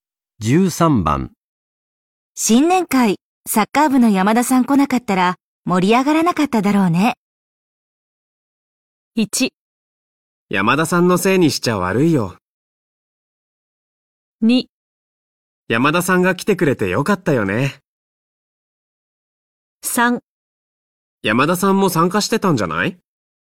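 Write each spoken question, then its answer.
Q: 新年会、サッカー部の山田さん来なかったら盛り上がらなかっただろ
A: 2: 山田さんが来てくれてよかったよね。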